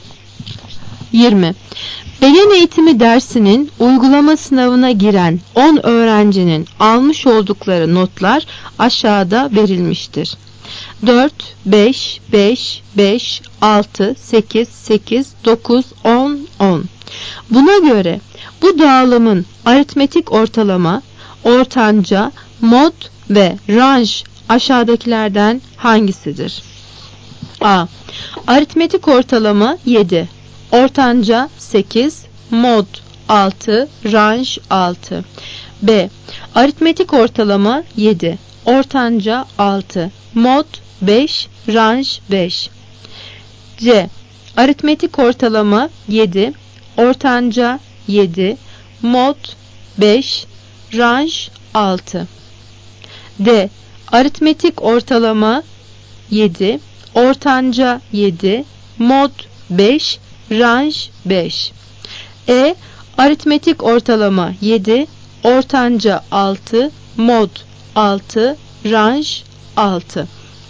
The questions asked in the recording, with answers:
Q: Buna göre bu dağılımın aritmetik ortalama, ortanca, mod ve range aşağıdakilerden hangisidir?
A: Cevap C. Aritmetik ortalama 7, ortanca 7, mod 5, range 6.